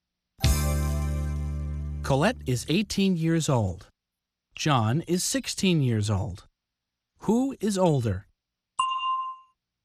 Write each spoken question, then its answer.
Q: Who is older?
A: Colette is. Colette is older than John.